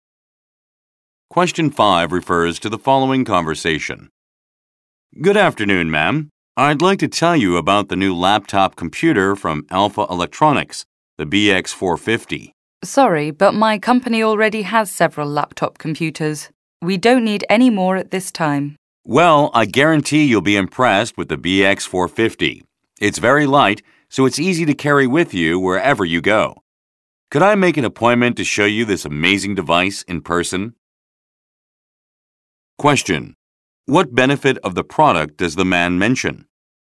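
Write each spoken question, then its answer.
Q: What benefit of the product does the man mention?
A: It is very light, so it is easy to carry anywhere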